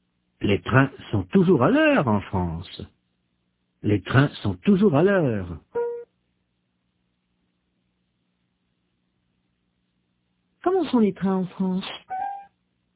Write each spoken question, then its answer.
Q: Comment sont les trains en France ?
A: Toujours à l'heure, très ponctuel.